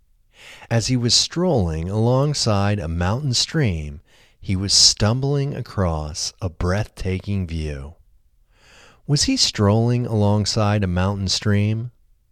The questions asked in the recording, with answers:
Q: Was he strolling alongside a mountain stream?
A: Yes, he was strolling alongside a mountain stream.